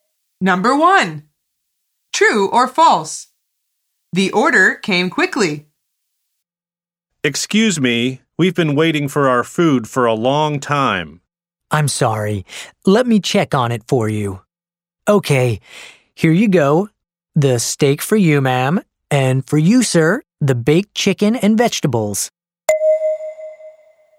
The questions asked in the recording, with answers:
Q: True or false? The order came quickly.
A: The answer is false.